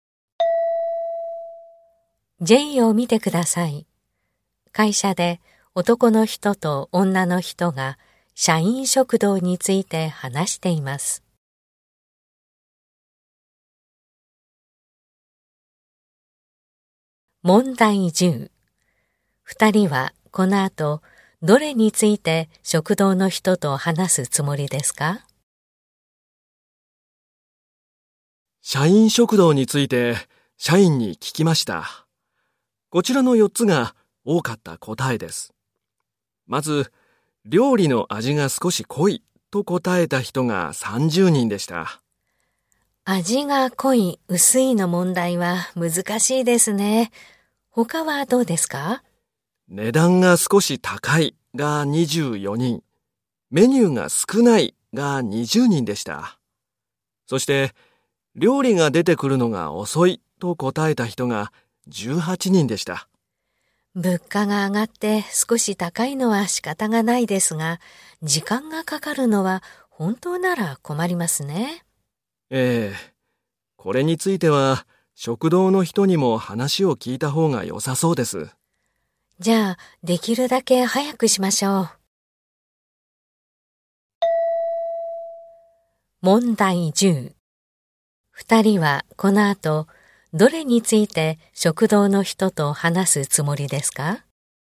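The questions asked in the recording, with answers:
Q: 二人はこの後どれについて食堂の人と話すつもりですか?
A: 料理が出てくるのが遅いこと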